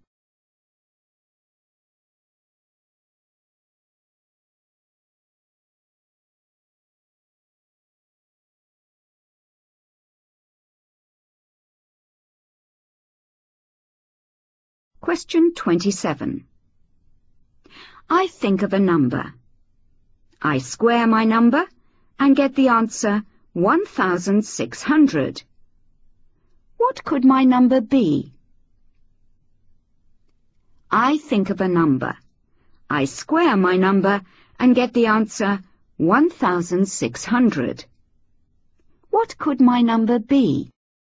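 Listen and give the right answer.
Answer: 40 (or −40)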